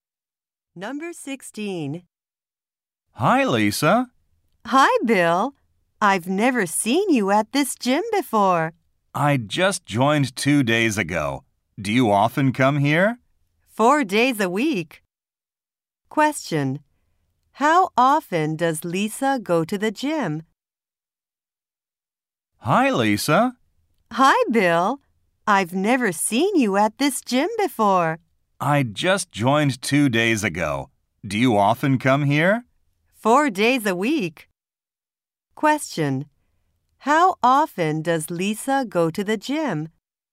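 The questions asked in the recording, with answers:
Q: How often does Lisa go to the gym?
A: Four days a week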